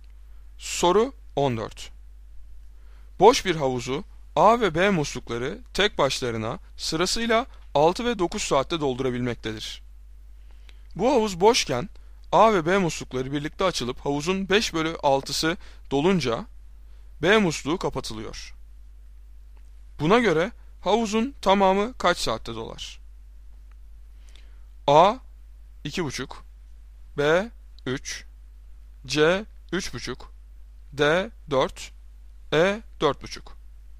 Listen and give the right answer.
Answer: Doğru cevap D 4.